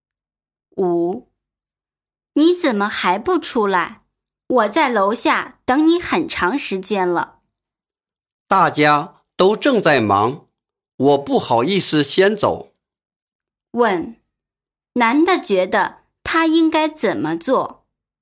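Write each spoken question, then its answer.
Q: 男的觉得他应该怎么做?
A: 不好意思先走,应该留下来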